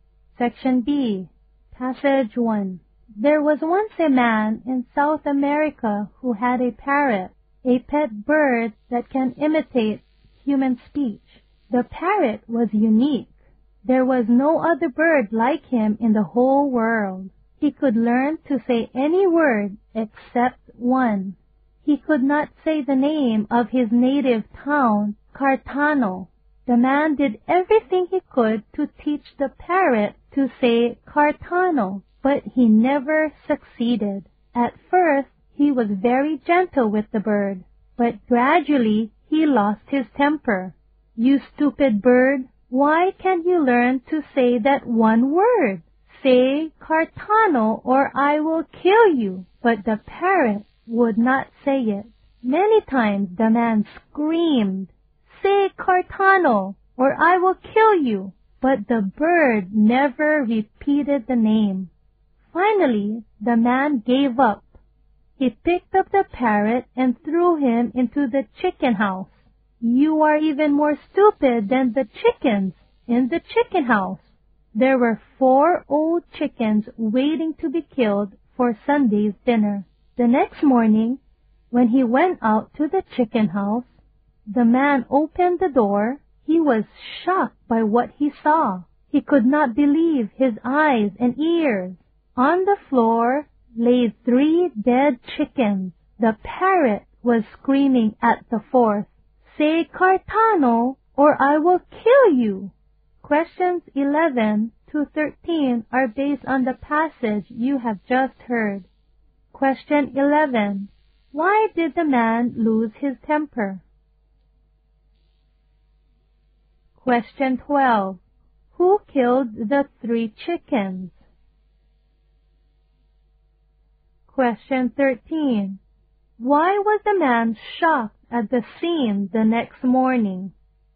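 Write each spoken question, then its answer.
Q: Why did the man lose his temper?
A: Because the parrot would not say the name of his town, Cartano.

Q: Who killed the three chickens?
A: The parrot.

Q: Why was the man shocked at the scene the next morning?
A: The parrot had killed three chickens and was shouting "Say Cartano or I will kill you" at the fourth.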